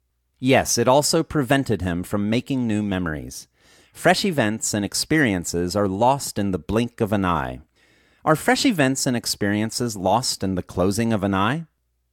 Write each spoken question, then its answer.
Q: Are fresh events and experiences lost in the closing of an eye?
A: No, fresh events and experiences aren't lost in the closing of an eye.